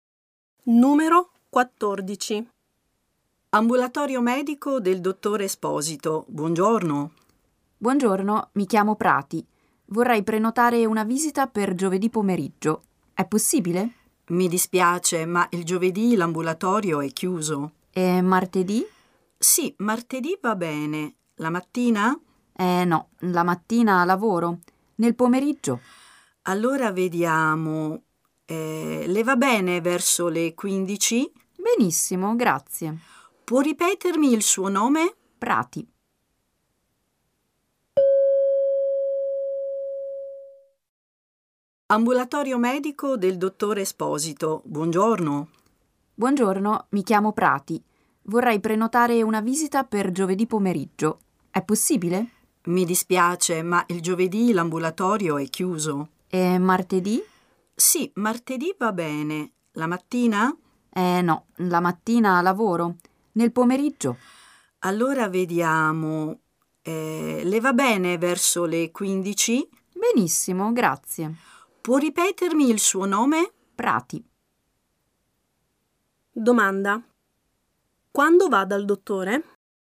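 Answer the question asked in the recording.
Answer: Martedì pomeriggio, verso le 15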